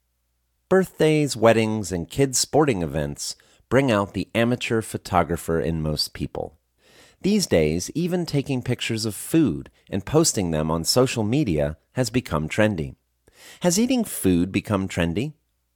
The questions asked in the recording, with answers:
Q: Has eating food become trendy?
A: No, eating food hasn't become trendy.